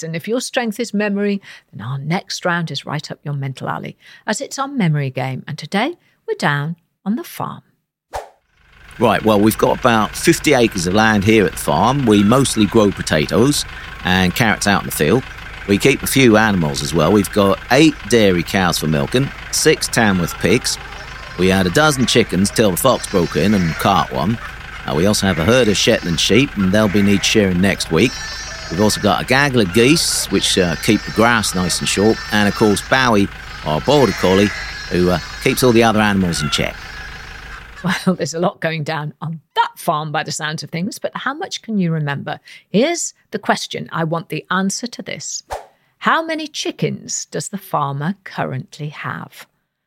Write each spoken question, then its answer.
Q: How many chickens does the farmer currently have?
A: And the answer is 11